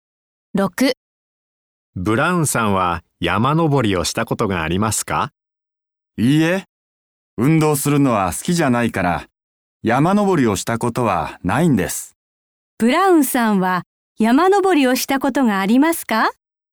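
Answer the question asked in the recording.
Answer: いいえ、ありません。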